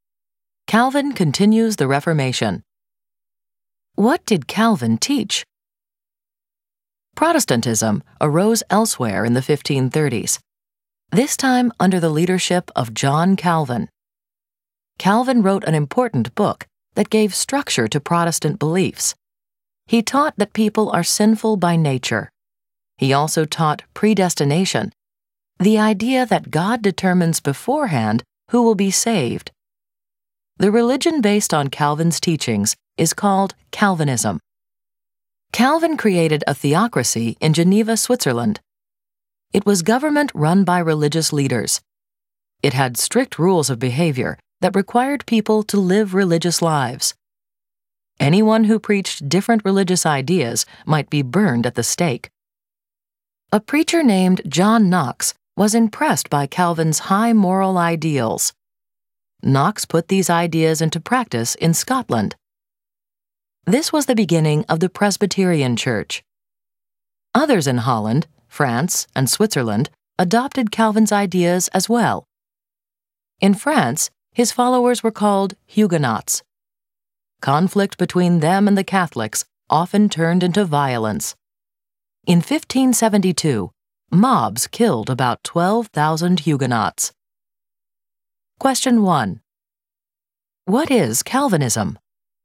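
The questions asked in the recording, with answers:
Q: What is Calvinism?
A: The religion based on John Calvin's teachings, such as that people are sinful by nature and predestination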